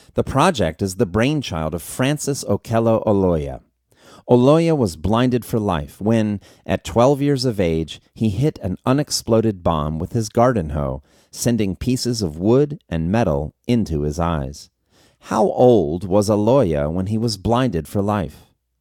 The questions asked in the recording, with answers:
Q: How old was Oloya when he was blinded for life?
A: Oloya was 12 years old when he was blinded for life.